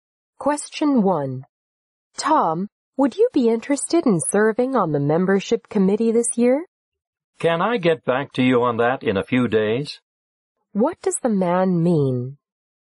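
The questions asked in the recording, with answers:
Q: What does the man mean?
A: He needs a few days to think about it before deciding.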